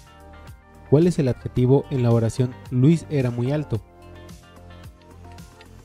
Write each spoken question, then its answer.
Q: ¿Cuál es el adjetivo en la oración Luis era muy alto?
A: Alto.